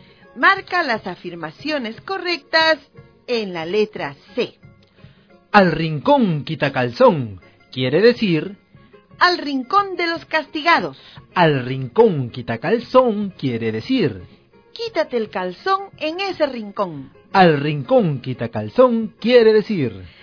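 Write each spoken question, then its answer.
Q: Al rincón quitacalzón quiere decir...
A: Al rincón de los castigados.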